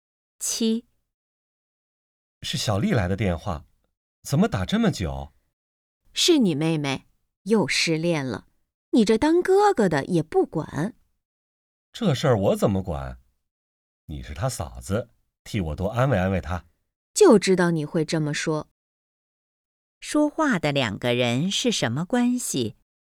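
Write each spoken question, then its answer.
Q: 说话的两个人是什么关系?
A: 夫妻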